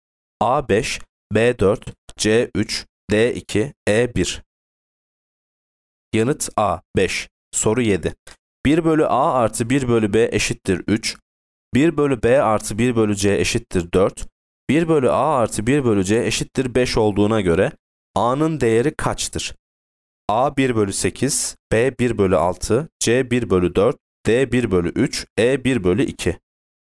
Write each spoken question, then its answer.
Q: 1 bölü a artı 1 bölü c eşittir 5 olduğuna göre a'nın değeri kaçtır?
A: Yanıt E 1 bölü 2.